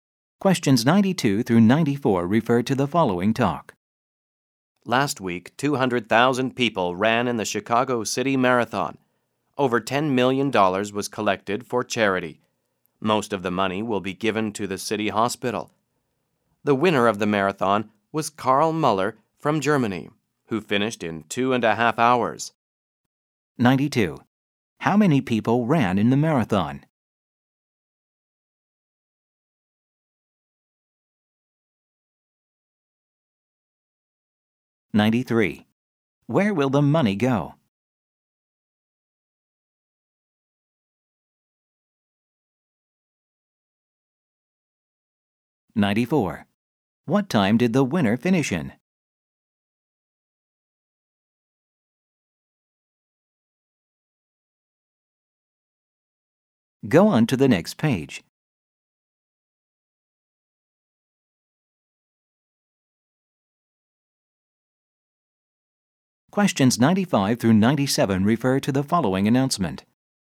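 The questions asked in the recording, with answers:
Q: How many people ran in the marathon?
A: 200,000

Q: Where will the money go?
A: Mostly to the city hospital

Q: What time did the winner finish in?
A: 2.5 hours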